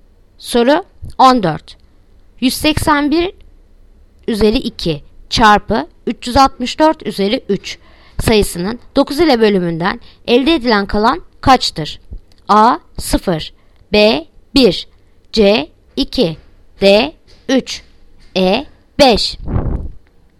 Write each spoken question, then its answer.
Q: 181 üzeri 2 çarpı 364 üzeri 3 sayısının 9 ile bölümünden elde edilen kalan kaçtır?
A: Yanıt Bursa 1.